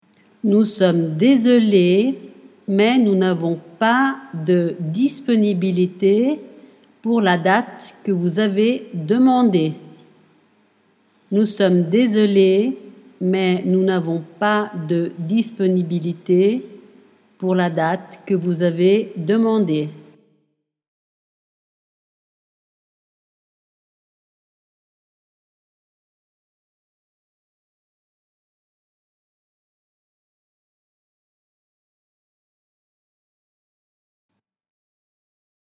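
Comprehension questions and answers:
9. Nous pour la date .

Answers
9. sommes désolés, mais nous n'avons pas de disponibilité / que vous avez demandée

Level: Dettato di francese A2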